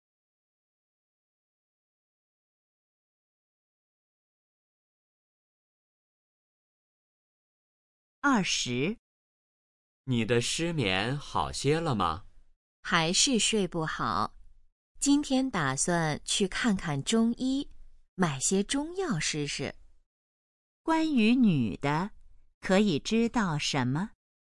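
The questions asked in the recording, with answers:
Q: 关于女的,可以知道什么?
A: 她失眠,打算去看中医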